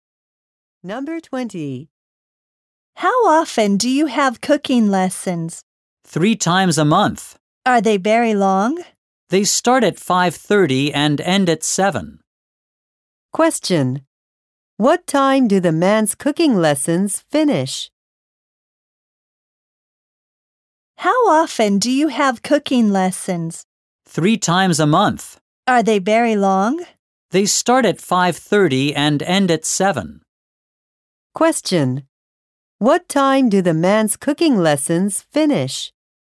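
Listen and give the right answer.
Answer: At 7.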